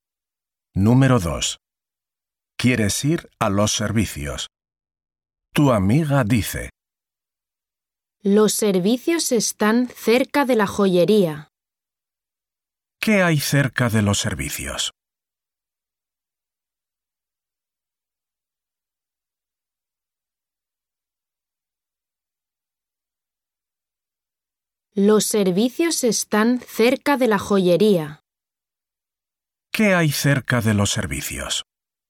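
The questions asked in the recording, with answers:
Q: ¿Qué hay cerca de los servicios?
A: la joyería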